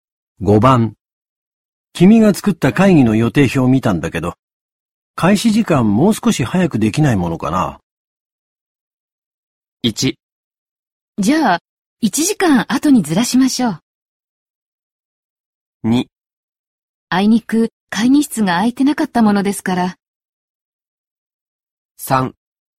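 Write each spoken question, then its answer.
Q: 君が作った会議の予定表を見たんだけど、開始時間もう少し早くできないものかな?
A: 2: あいにく会議室が空いてなかったものですから。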